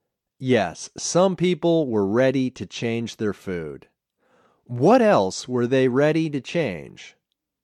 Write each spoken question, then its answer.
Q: What else were they ready to change?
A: They were ready to change their lives.